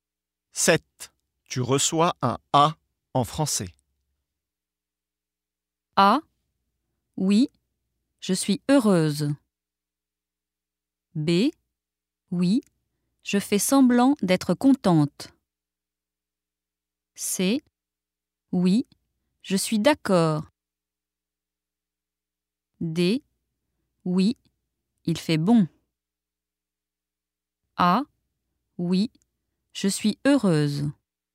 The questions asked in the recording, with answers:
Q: Tu reçois un A en français.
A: A. Oui, je suis heureuse.